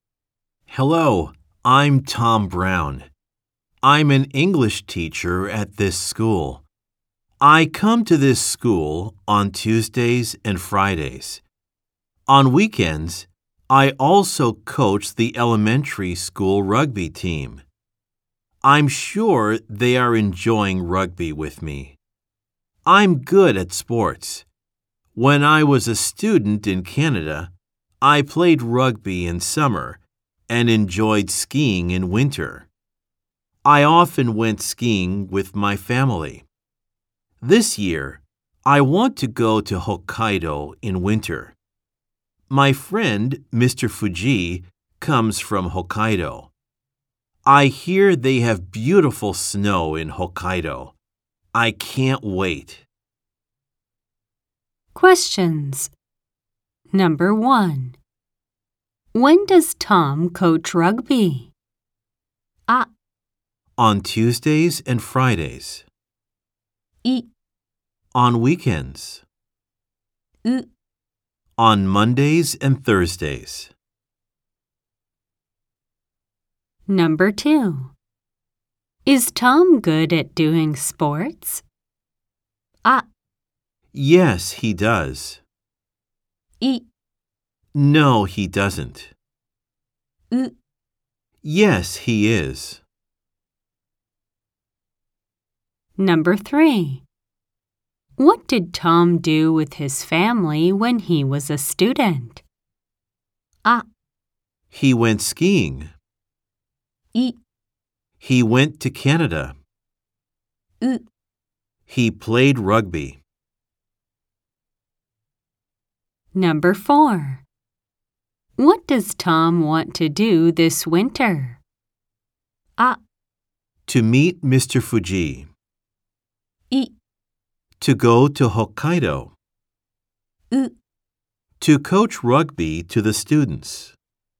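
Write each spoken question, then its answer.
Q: When does Tom coach rugby?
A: I: On weekends.

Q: Is Tom good at doing sports?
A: U: Yes, he is.

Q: What did Tom do with his family when he was a student?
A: A: He went skiing.

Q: What does Tom want to do this winter?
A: I: To go to Hokkaido.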